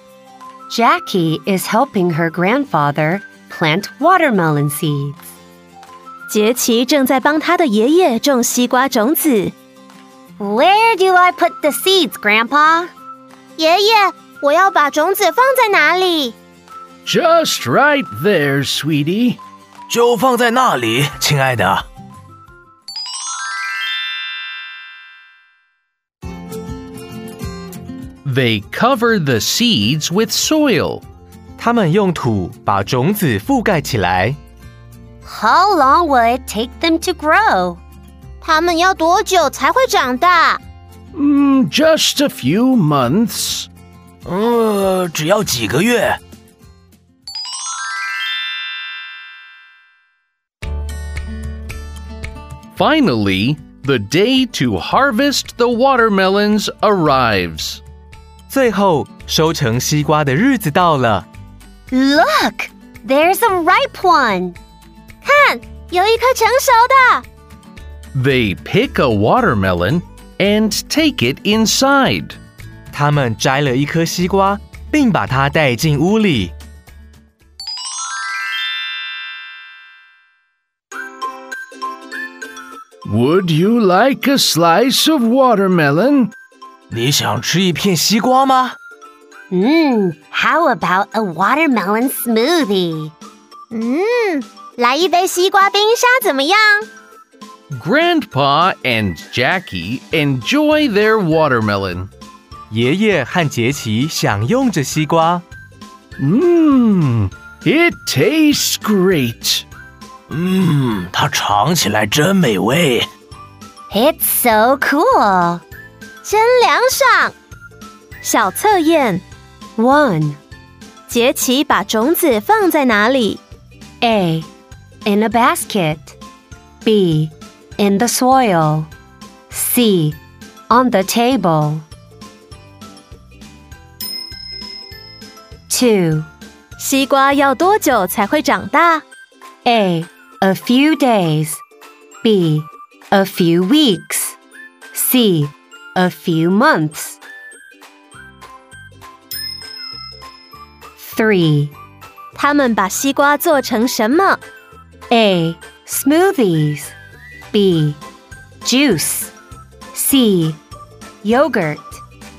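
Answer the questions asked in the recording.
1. B: In the soil.
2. C: A few months.
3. A: Smoothies.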